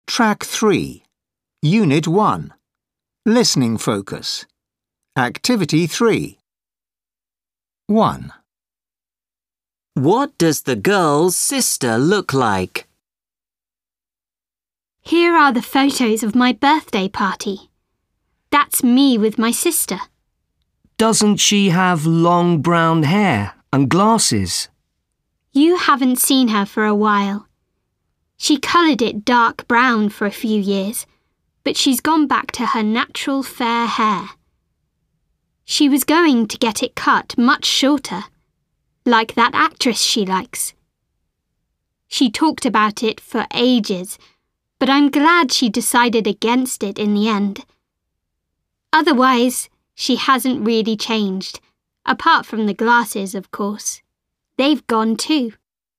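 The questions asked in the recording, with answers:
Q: What does the girl's sister look like?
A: She has long fair hair and no glasses.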